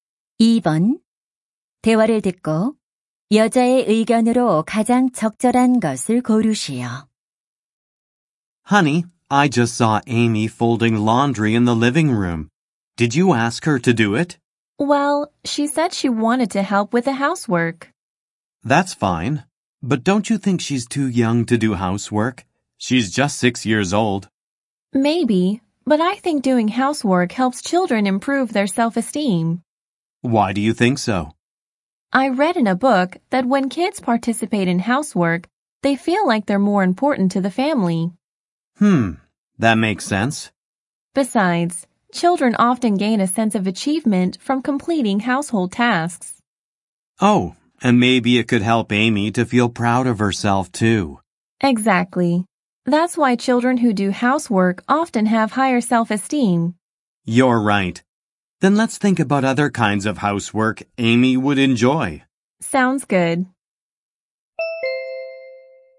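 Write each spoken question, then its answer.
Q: 대화를 듣고 여자의 의견으로 가장 적절한 것을 고르시오.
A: 집안일을 하는 것은 아이들의 자존감 향상에 도움이 된다.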